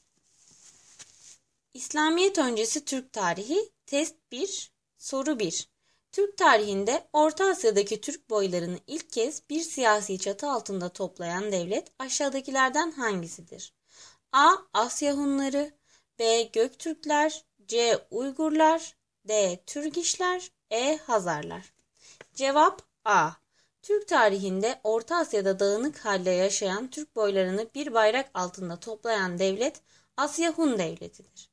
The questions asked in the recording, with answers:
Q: Türk tarihinde Orta Asya'daki Türk boylarını ilk kez bir siyasi çatı altında toplayan devlet aşağıdakilerden hangisidir?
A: Cevap A.